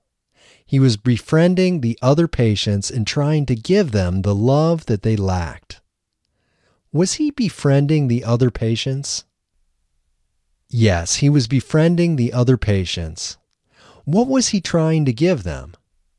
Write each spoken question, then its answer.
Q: What was he trying to give them?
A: He was trying to give them the love that they lacked.